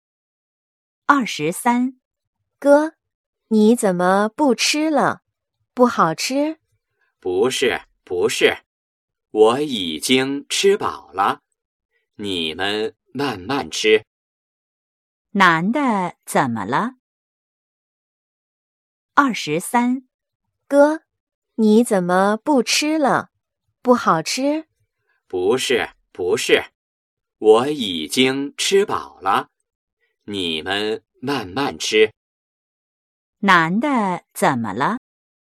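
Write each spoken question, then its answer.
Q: 男的怎么了?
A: 他已经吃饱了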